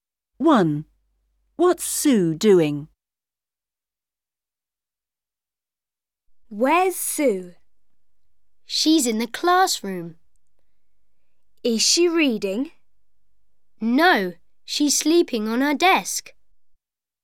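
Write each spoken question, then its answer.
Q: What's Sue doing?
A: Sleeping on her desk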